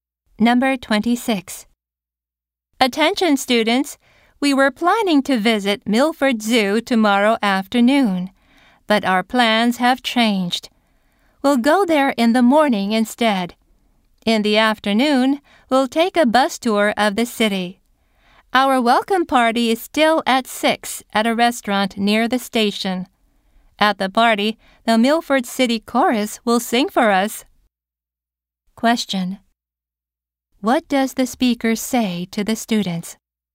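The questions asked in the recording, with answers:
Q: What does the speaker say to the students?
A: They will visit Milford Zoo in the morning instead of the afternoon.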